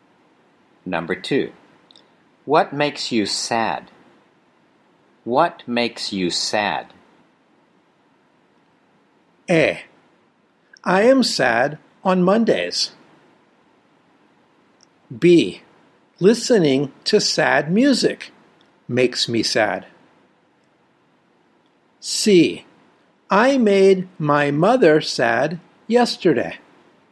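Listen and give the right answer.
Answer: B: Listening to sad music makes me sad.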